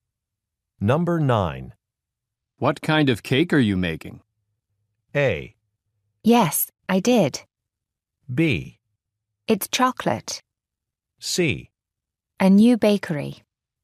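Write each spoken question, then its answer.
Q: What kind of cake are you making?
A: B: It's chocolate.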